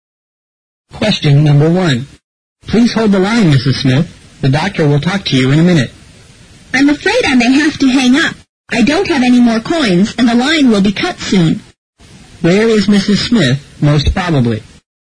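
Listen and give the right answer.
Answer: At a public pay phone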